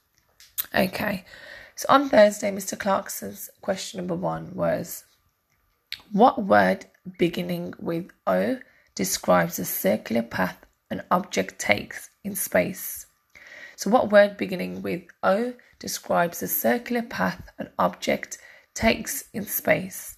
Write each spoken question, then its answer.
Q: what word beginning with O describes a circular path an object takes in space?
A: And the answer was orbit.